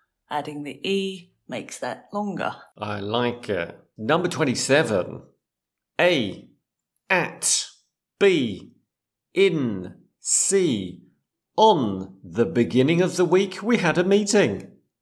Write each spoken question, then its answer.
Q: A. At, B, in, C, on the beginning of the week, we had a meeting.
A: At the beginning of the week, we had a meeting.